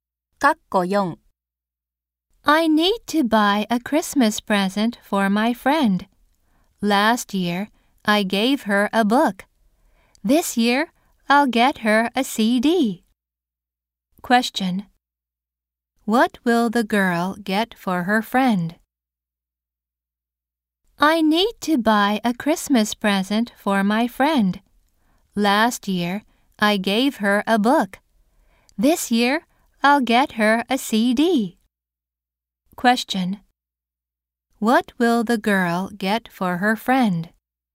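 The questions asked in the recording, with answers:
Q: What will the girl get for her friend?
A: A CD.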